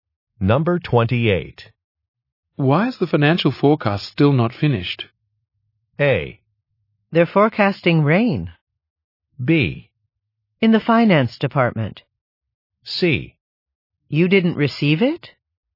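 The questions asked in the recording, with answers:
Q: Why is the financial forecast still not finished?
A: C: You didn't receive it?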